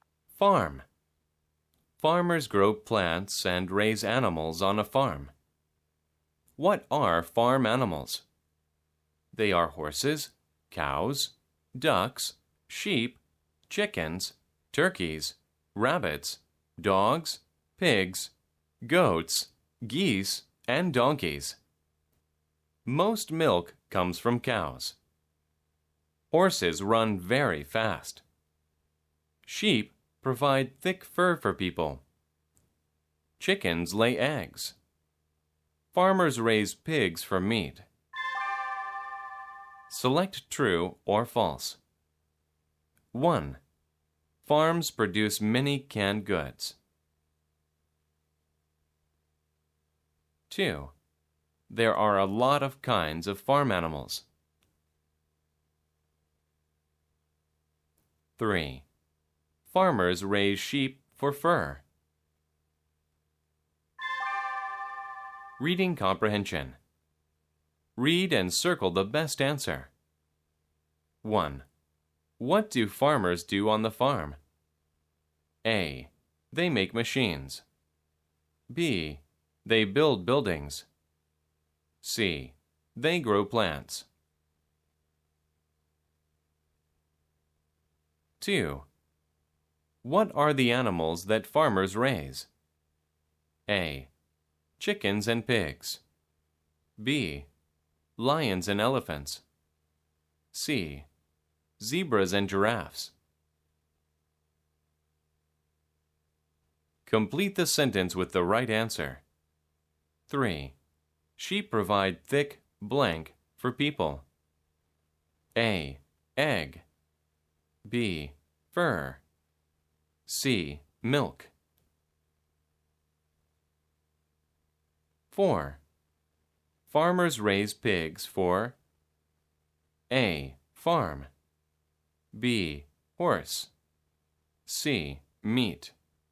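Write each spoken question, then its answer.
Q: There are a lot of kinds of farm animals.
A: True

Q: Farmers raise sheep for fur.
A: True

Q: What do farmers do on the farm?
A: C: They grow plants.

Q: What are the animals that farmers raise?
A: A: Chickens and pigs.

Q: Sheep provide thick, blank, for people.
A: B: Fur.

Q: Farmers raise pigs for A.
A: C: Meat.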